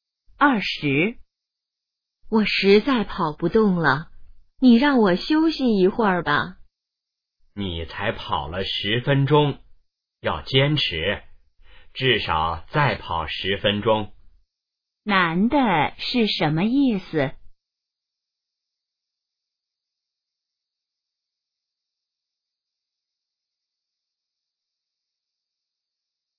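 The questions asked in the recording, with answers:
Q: 男的是什么意思?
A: 要坚持,再跑10分钟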